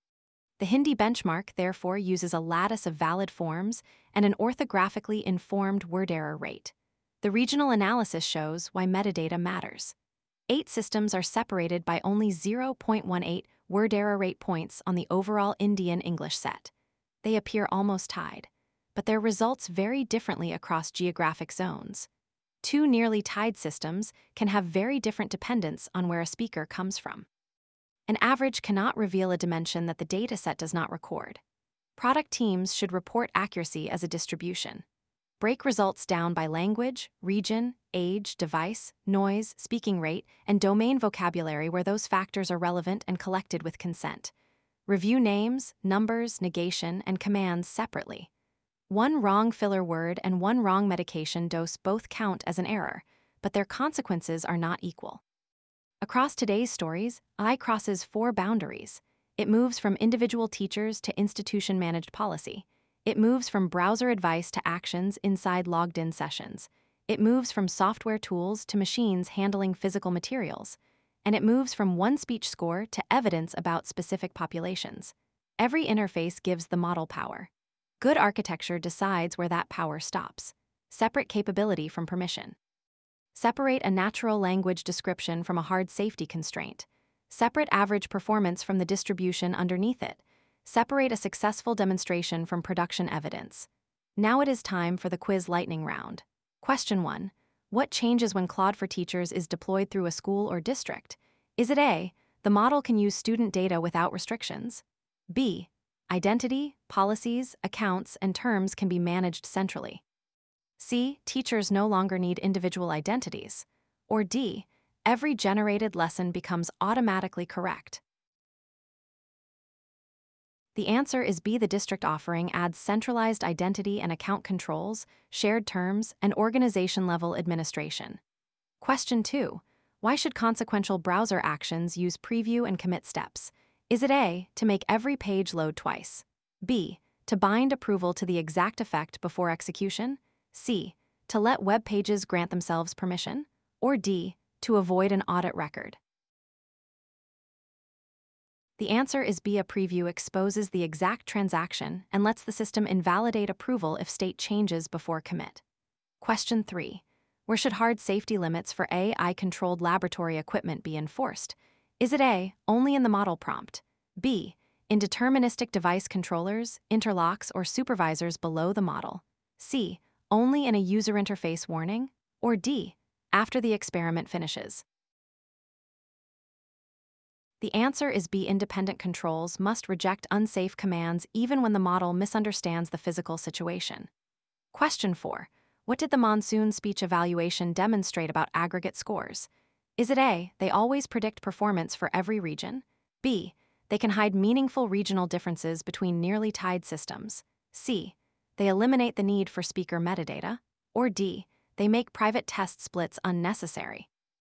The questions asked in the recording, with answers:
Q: What did the Monsoon speech evaluation demonstrate about aggregate scores?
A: The answer is B, systems close in overall word error rate showed different amounts and patterns of variation across geographic zones.